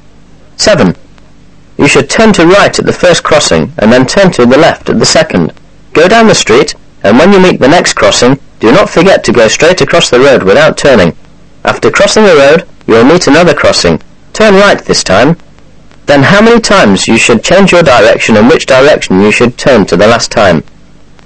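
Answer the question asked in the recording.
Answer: 3 times; turn right the last time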